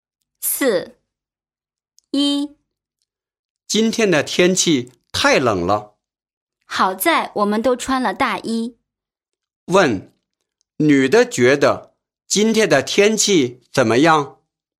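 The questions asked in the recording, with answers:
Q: 女的觉得今天的天气怎么样?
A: 太冷了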